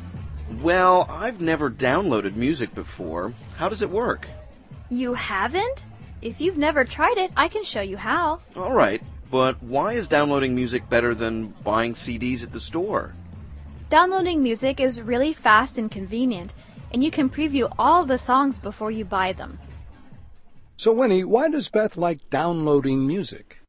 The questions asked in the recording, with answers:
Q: So Winnie, why does Beth like downloading music?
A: 她说啊,从网上下载歌曲又快又方便,还可以在购买前 preview 试听一下。